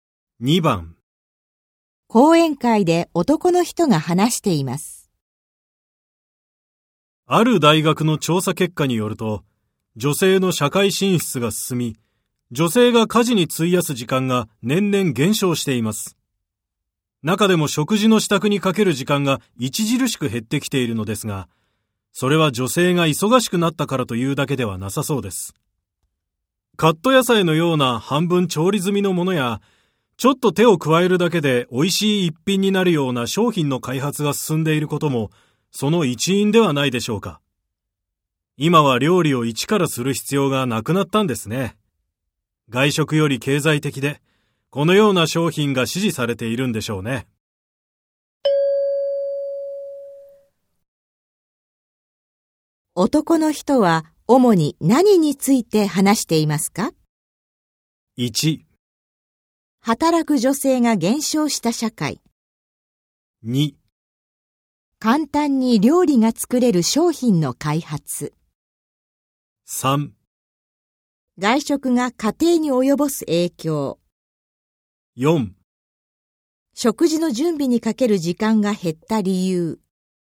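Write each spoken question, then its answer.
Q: 男の人は、主に何について話していますか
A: 4: 食事の準備にかける時間が減った理由。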